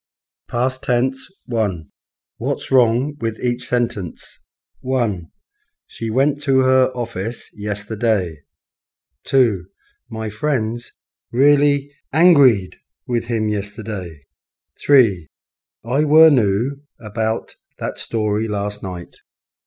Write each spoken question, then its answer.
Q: My friends really angried with him yesterday.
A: My friends were really angry with him yesterday.

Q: I were new about that story last night.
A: I knew about that story last night.